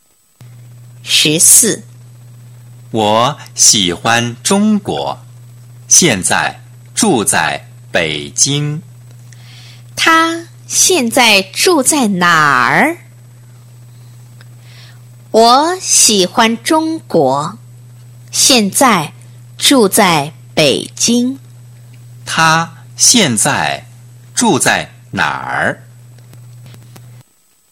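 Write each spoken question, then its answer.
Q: 他现在住在哪儿?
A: 北京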